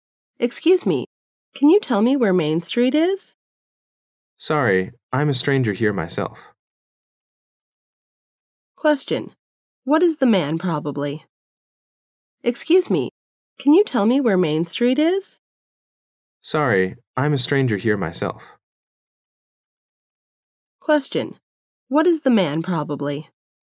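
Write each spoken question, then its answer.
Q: What is the man probably?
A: A stranger/visitor in the area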